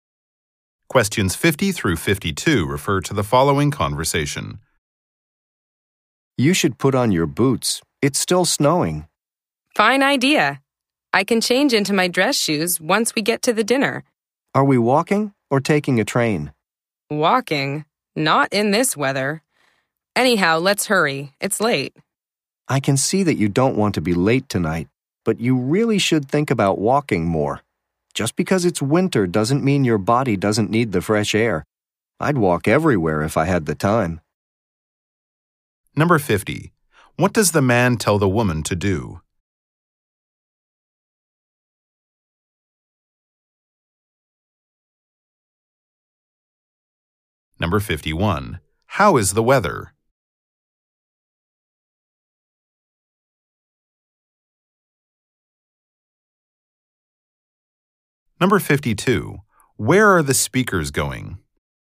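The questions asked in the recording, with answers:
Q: How is the weather?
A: Snowy

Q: Where are the speakers going?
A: To a dinner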